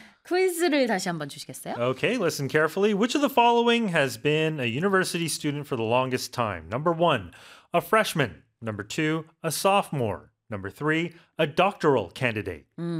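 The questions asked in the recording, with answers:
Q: Which of the following has been a university student for the longest time?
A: 3: a doctoral candidate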